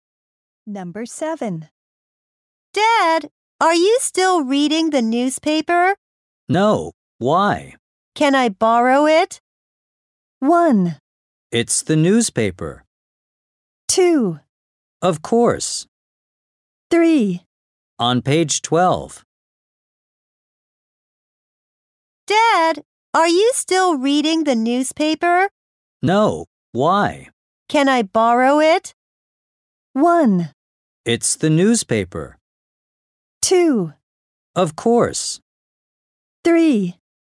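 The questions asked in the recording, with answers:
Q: Can I borrow it?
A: 2: Of course.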